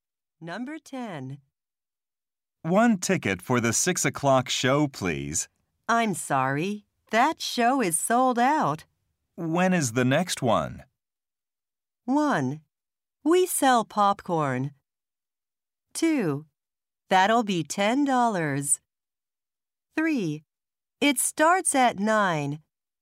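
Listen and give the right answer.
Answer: 3: It starts at 9.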